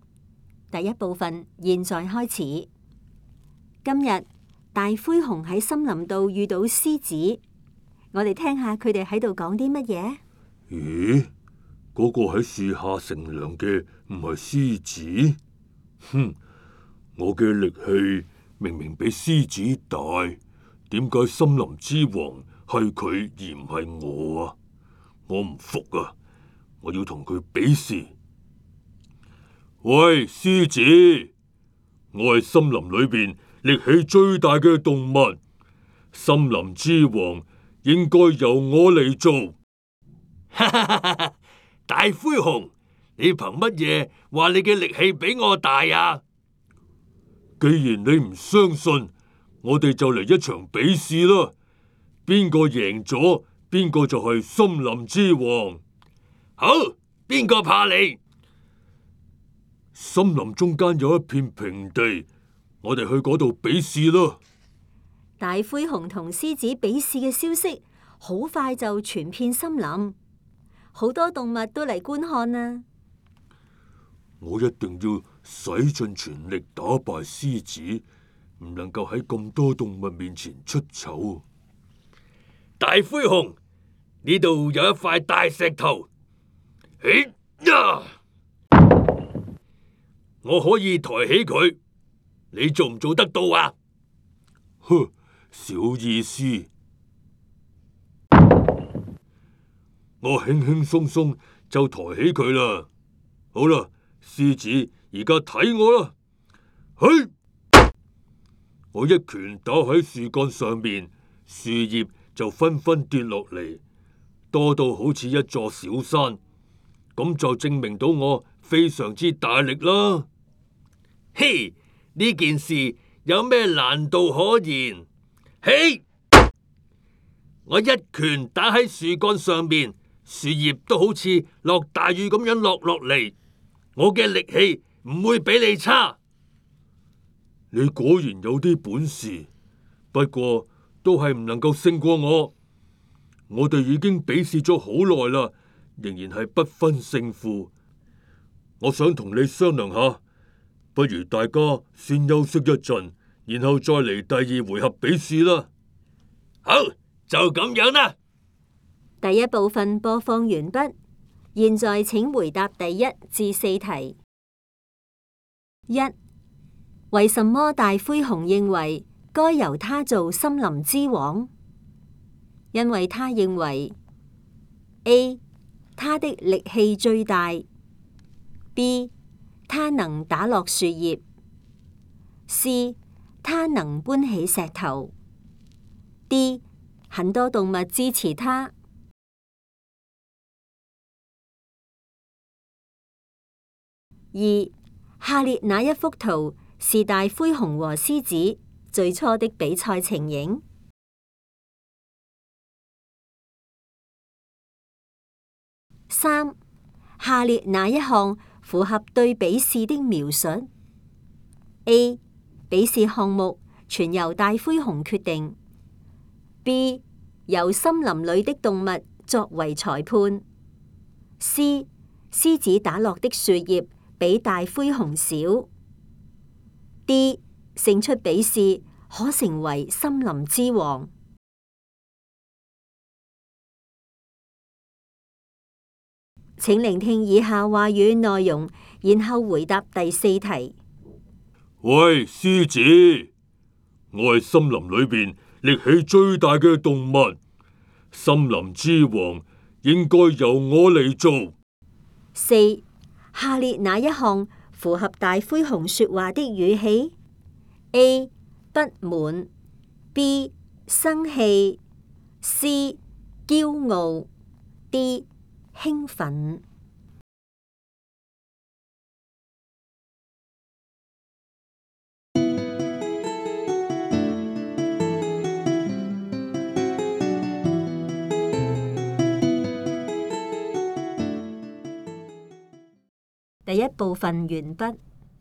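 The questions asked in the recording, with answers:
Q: 为什么大灰熊认为该由他做森林之王?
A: A: 他的力气最大

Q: 下列哪一项符合对比试的描述 ?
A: D: 胜出比试可成为森林之王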